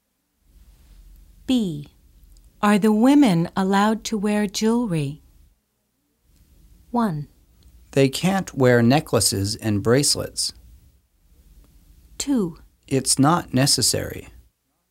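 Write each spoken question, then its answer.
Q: Are the women allowed to wear jewelry?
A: 1: They can't wear necklaces and bracelets.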